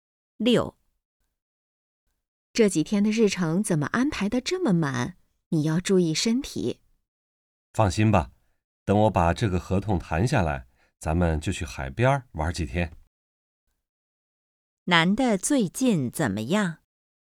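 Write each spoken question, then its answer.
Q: 男的最近怎么样?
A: 工作很忙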